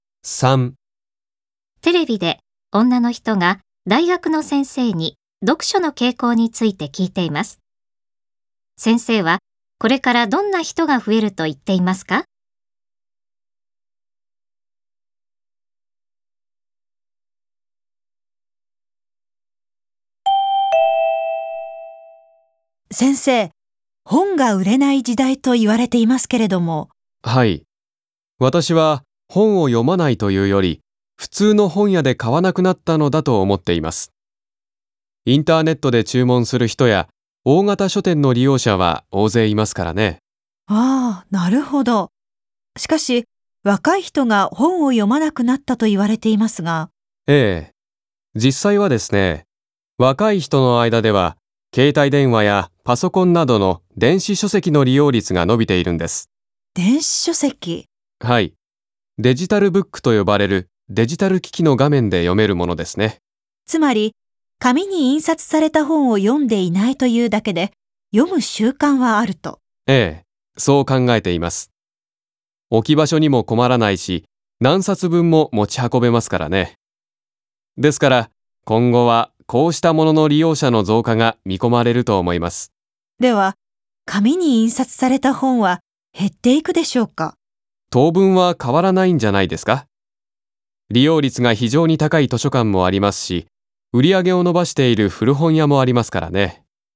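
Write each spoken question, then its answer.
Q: 先生はこれからどんな人が増えると言っていますか?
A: 電子書籍(デジタルブック)を利用する人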